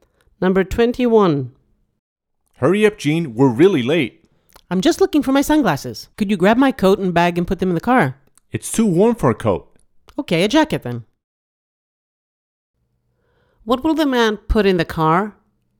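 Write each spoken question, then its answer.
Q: What will the man put in the car?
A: A jacket and a bag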